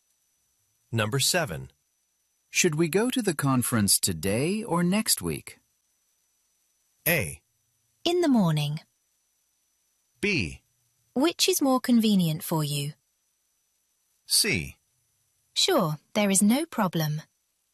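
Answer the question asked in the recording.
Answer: B: Which is more convenient for you?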